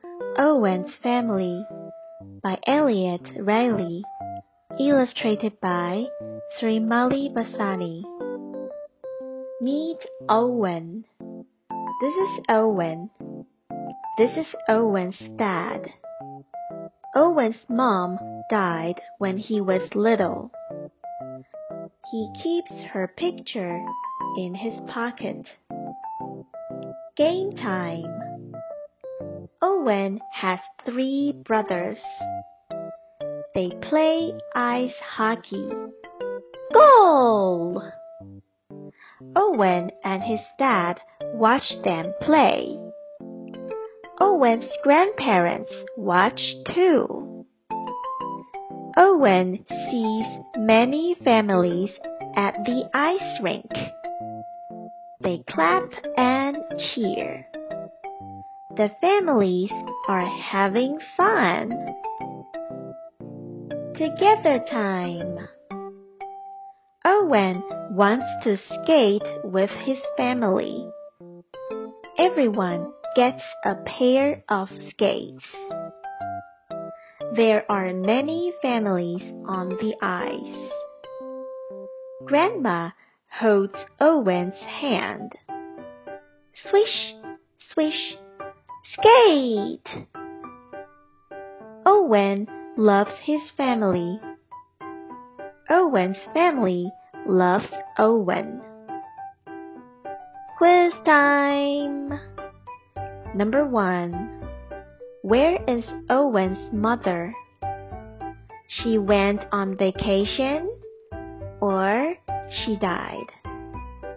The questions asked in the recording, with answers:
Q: Where is Owen's mother?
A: That's right. She died.